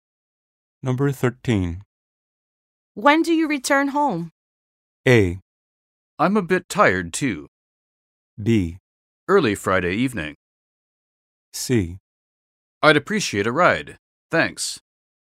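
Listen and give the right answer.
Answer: B: Early Friday evening.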